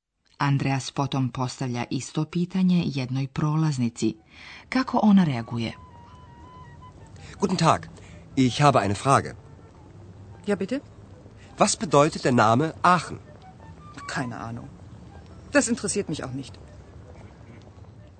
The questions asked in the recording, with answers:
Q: Kako ona reaguje?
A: Andreas opet ima peh. Prolaznica mu govori da nema pojma.